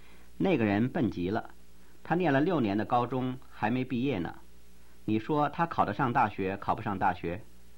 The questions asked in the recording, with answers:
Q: 你说他考得上大学考不上大学?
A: 我说他考不上大学。